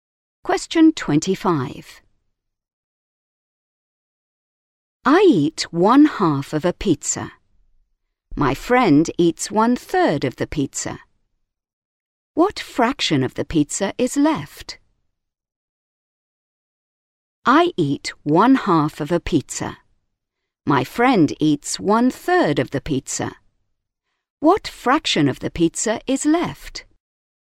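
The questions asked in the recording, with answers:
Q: What fraction of the pizza is left?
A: 1/6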